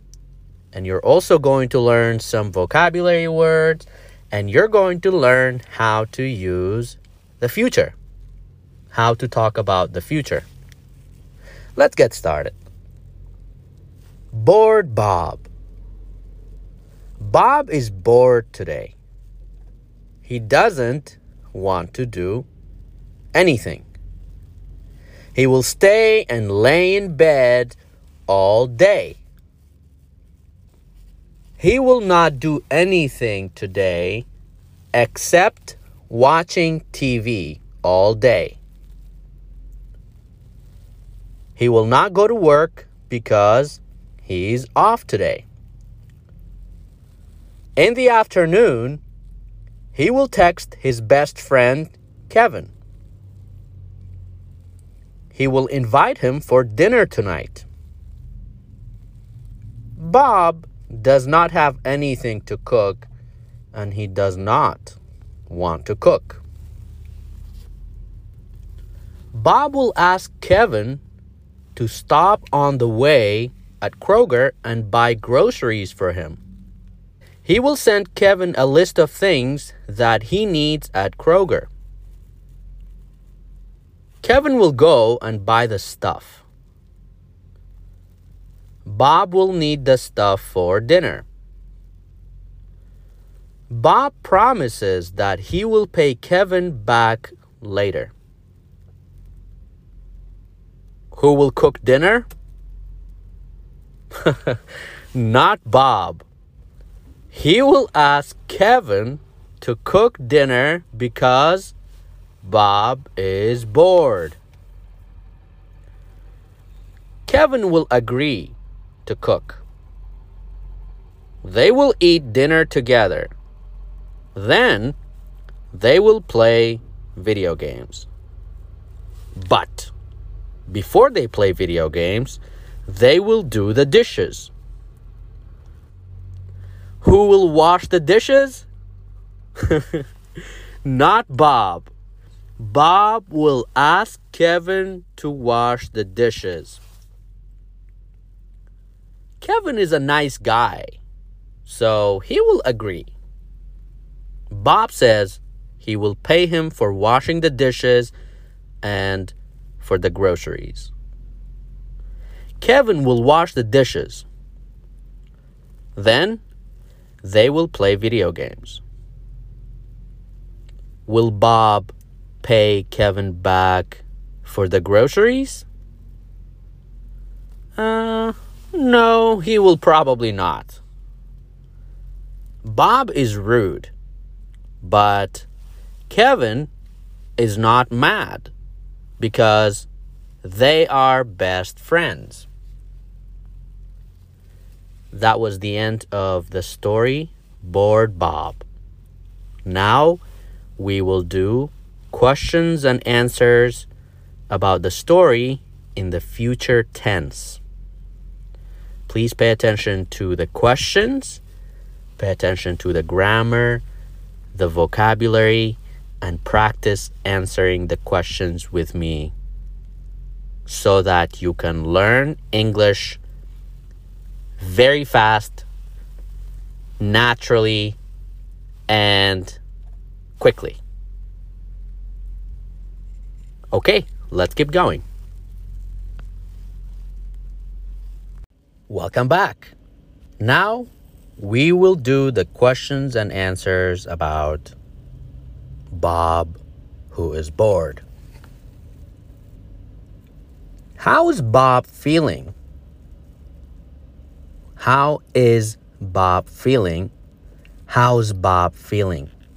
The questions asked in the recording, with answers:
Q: How is Bob feeling?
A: Bob is bored. Bob is bored.